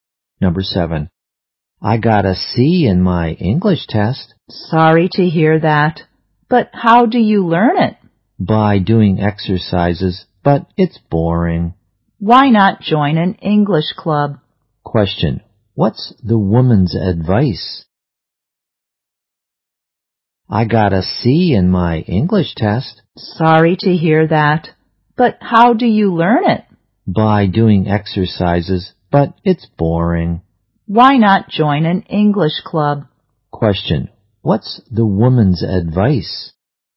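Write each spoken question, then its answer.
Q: What's the woman's advice?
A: Join an English club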